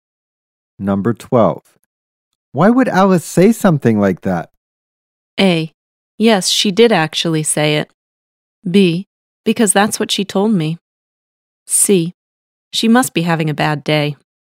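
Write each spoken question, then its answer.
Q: Why would Alice say something like that?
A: C: She must be having a bad day.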